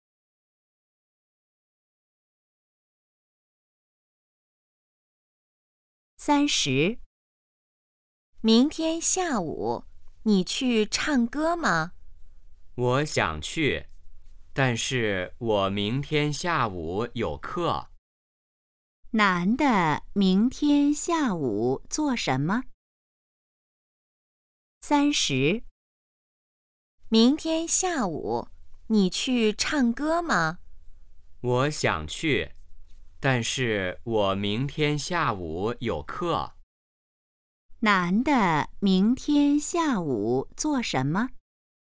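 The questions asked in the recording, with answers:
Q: 男的明天下午做什么?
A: 上课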